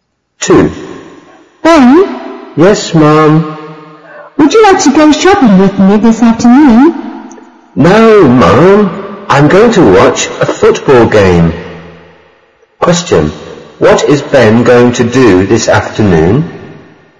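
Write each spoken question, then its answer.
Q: What is Ben going to do this afternoon?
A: Watch a football game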